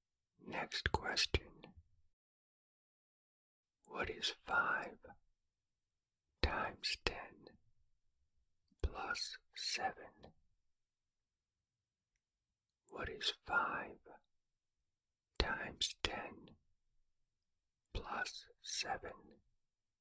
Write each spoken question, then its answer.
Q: What is 5 times 10 plus 7?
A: The answer is 57.